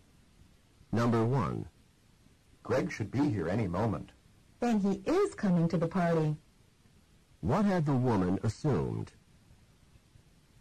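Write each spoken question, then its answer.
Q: What had the woman assumed?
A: That Greg was not coming to the party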